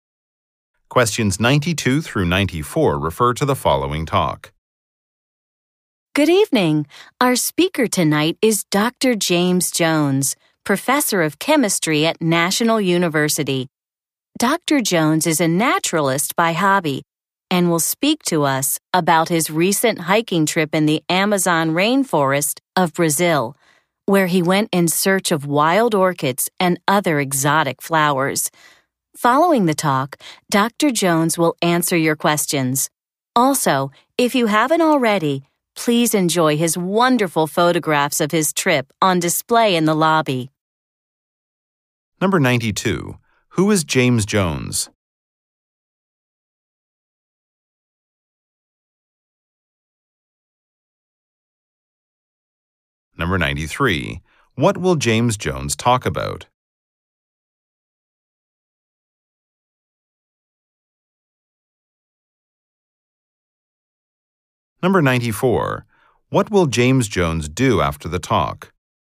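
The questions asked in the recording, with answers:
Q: Who is James Jones?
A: A chemistry professor.

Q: What will James Jones talk about?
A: His hiking trip in the Amazon rainforest.

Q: What will James Jones do after the talk?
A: Answer questions.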